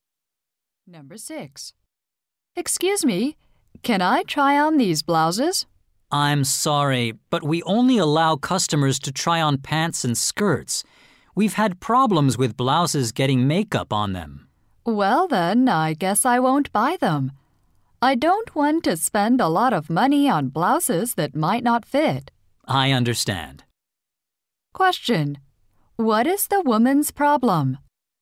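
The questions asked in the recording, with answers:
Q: What is the woman's problem?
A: She can't try on the blouses.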